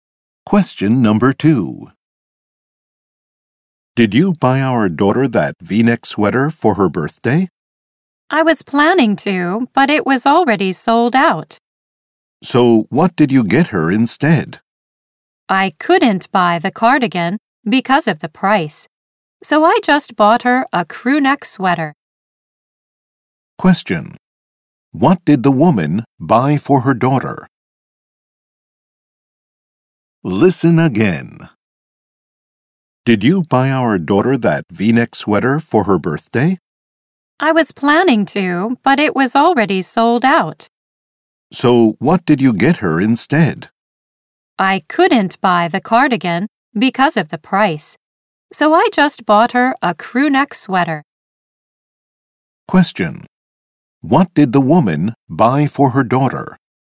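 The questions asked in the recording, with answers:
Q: What did the woman buy for her daughter?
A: A crew neck sweater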